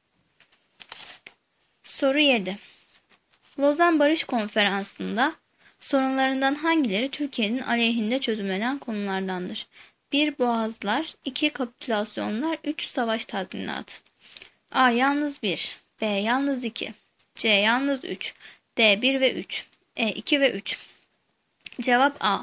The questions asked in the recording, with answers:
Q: Lozan Barış Konferansı'nda sorunlarından hangileri Türkiye'nin aleyhinde çözümlenen konulardandır?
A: Cevap A.